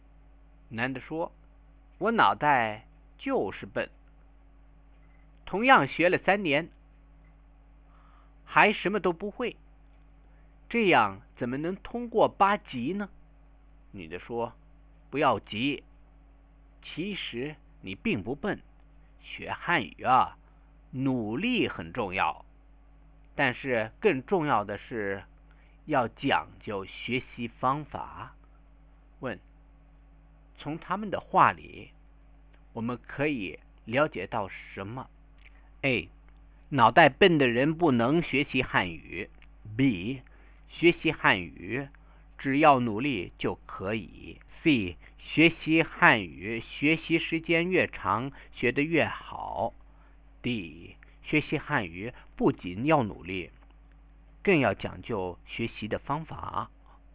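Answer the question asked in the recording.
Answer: D: 学习汉语不仅要努力,更要讲究学习的方法。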